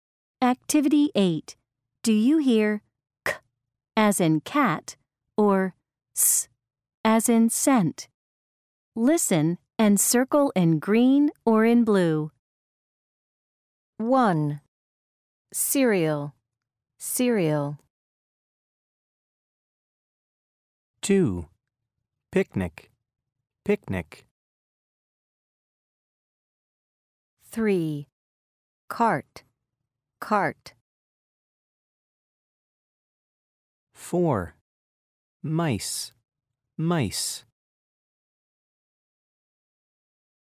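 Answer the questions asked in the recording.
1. s as in scent
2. k as in cat
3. k as in cat
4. s as in scent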